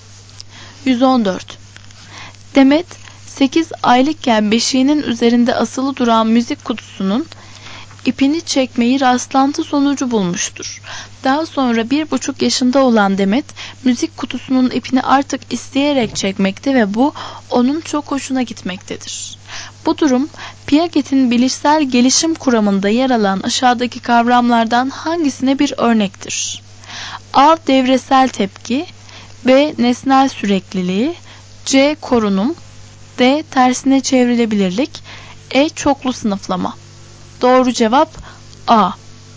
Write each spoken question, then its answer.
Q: Bu durum, Piaget'in bilişsel gelişim kuramında yer alan aşağıdaki kavramlardan hangisine bir örnektir?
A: Doğru cevap A.